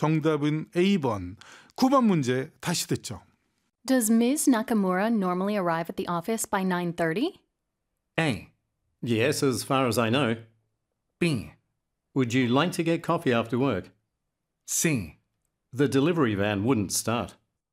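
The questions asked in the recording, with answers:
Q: Does Ms. Nakamura normally arrive at the office by 9:30?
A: A: Yes, as far as I know.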